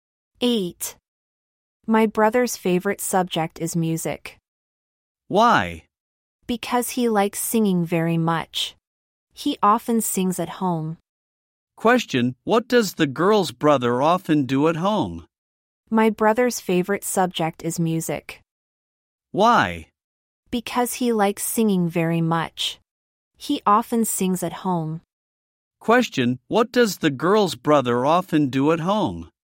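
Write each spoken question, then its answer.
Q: Question: What does the girl's brother often do at home?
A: He sings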